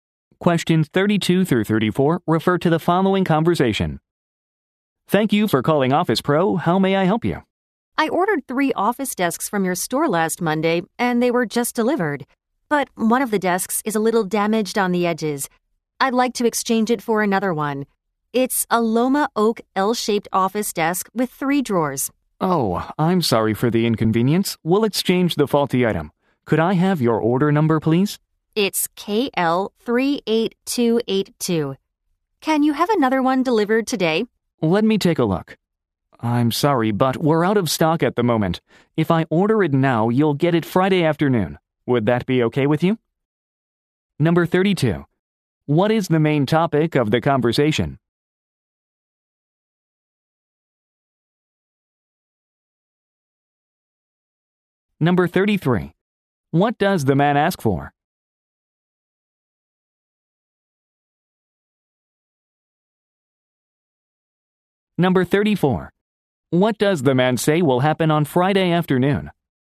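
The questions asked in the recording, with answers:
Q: What is the main topic of the conversation?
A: Exchanging a damaged desk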